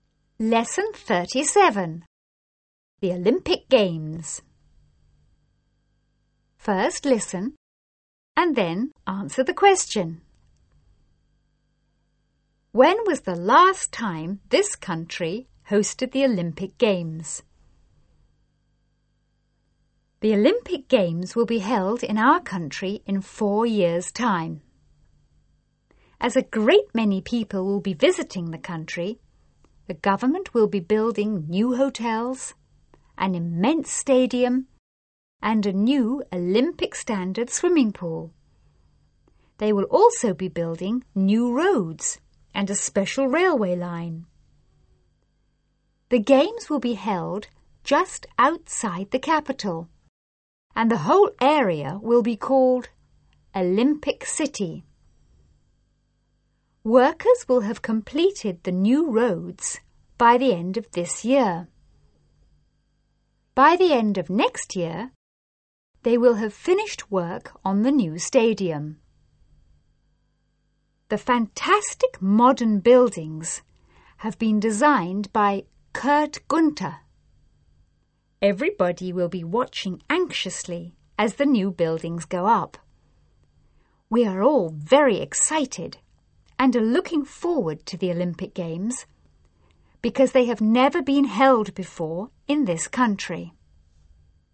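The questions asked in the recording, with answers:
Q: When was the last time this country hosted the Olympic Games?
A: Never; the Olympic Games have never been held there before.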